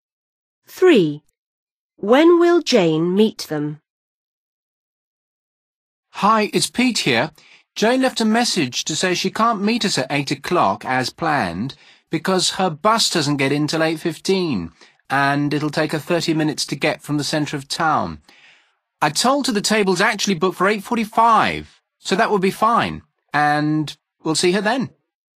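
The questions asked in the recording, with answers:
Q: When will Jane meet them?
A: at 8:45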